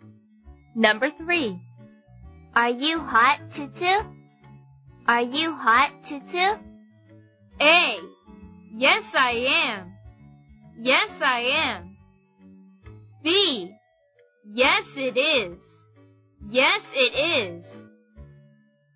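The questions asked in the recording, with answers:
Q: Are you hot, Tutu?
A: A: Yes, I am.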